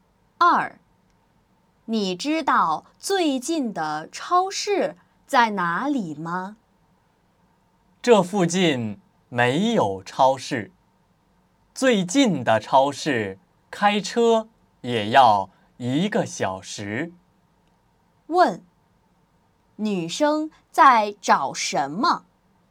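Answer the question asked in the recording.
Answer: 超市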